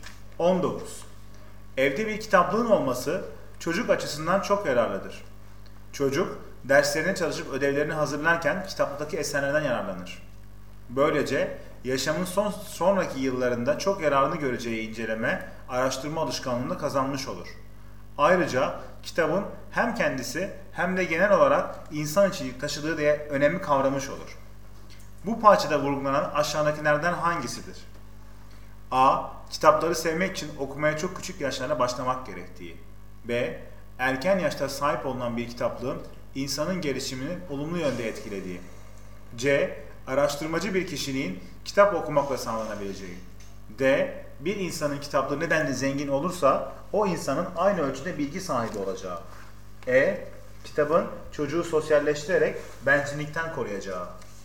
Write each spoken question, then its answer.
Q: Bu parçada vurgulanan aşağıdakilerden hangisidir?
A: Doğru yanıt B.